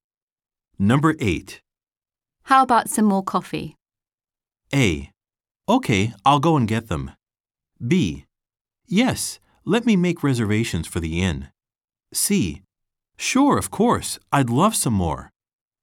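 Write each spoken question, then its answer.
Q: How about some more coffee?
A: C: Sure, of course, I'd love some more.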